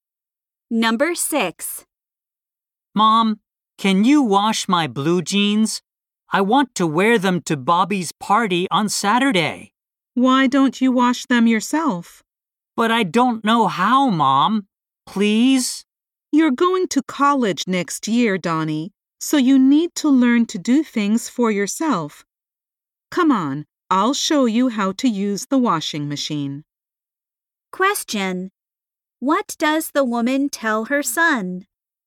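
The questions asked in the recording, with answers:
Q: What does the woman tell her son?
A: He should learn to wash his jeans himself; she'll show him how to use the washing machine.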